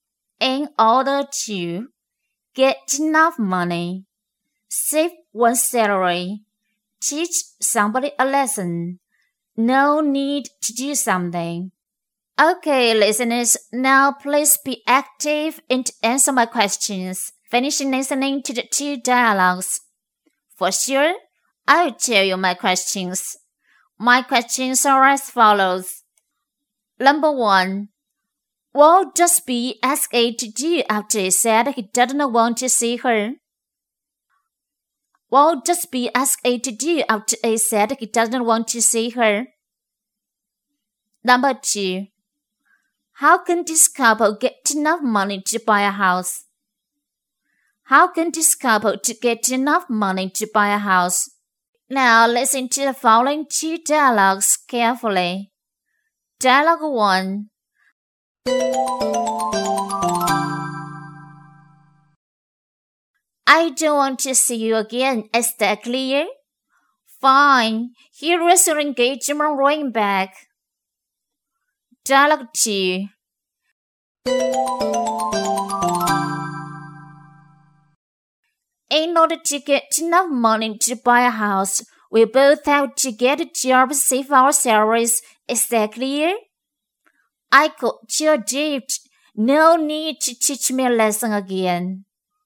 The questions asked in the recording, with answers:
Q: What does B ask A to do after he said he doesn't want to see her?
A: B asks A to take his engagement ring to her back.

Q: How can this couple get enough money to buy a house?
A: They must get jobs and save their salaries.